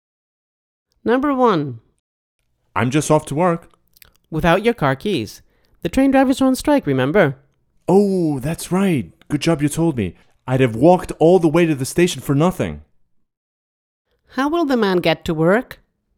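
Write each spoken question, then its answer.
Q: How will the man get to work?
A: By car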